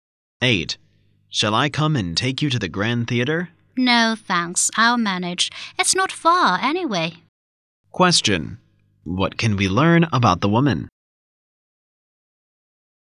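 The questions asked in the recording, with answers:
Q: What can we learn about the woman?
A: She will go to the theater by herself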